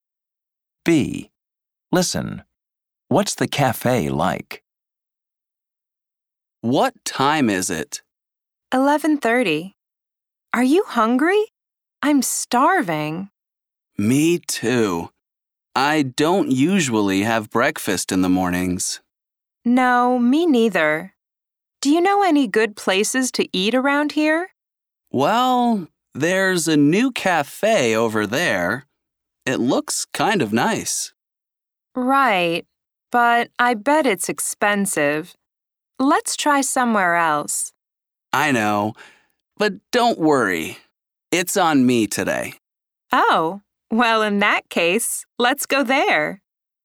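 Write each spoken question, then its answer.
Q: What's the cafe like?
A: It's new and looks kind of nice, but it's probably expensive.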